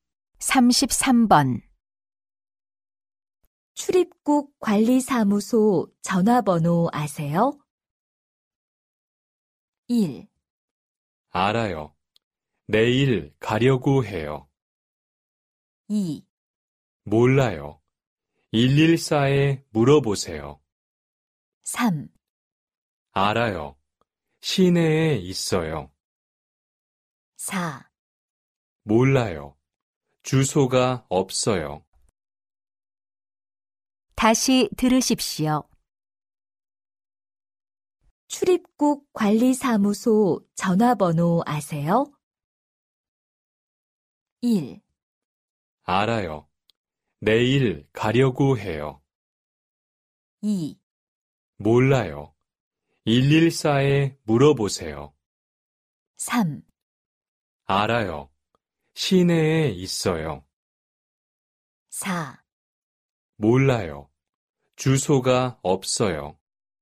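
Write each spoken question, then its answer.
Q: 출입국 관리사무소 전화번호 아세요?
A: 2: 몰라요. 114에 물어보세요.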